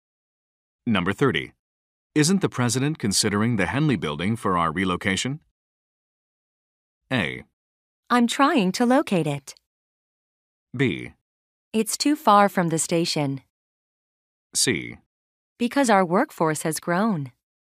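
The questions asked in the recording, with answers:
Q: Isn't the president considering the Henley building for our relocation?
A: B: It's too far from the station.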